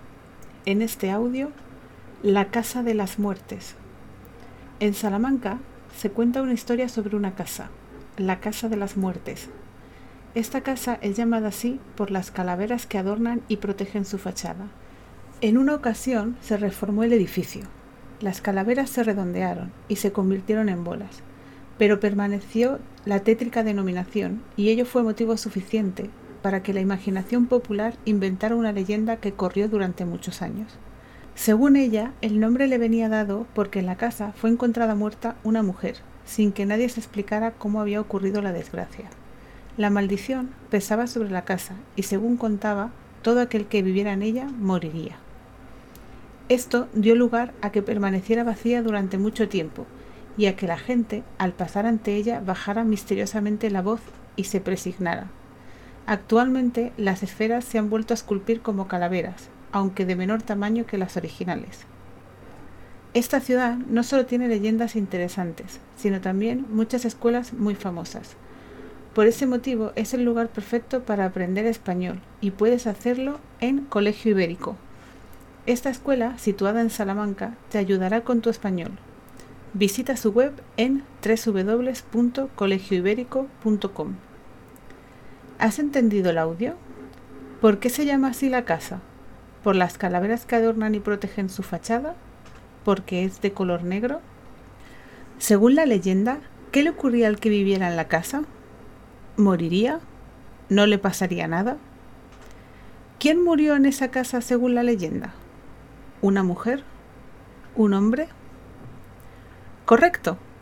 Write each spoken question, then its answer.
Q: ¿Por qué se llama así la casa?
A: por las calaveras que adornan y protegen su fachada

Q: Según la leyenda, ¿qué le ocurría al que viviera en la casa?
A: moriría

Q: ¿Quién murió en esa casa según la leyenda?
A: una mujer